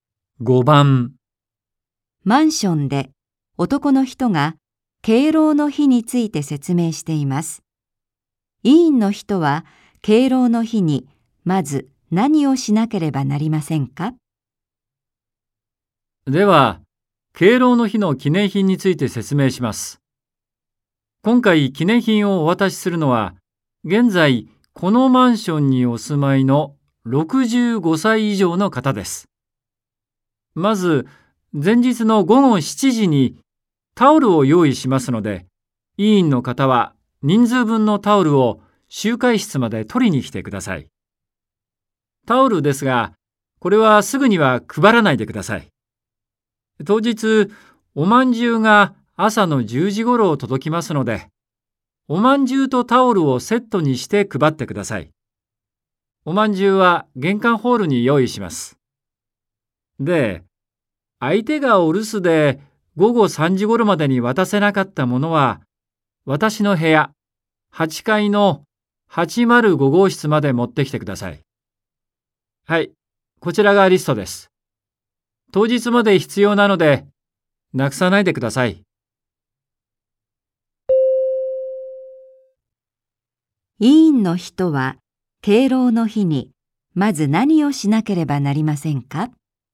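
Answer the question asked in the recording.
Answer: 玄関ホールへおまんじゅうを取りに行く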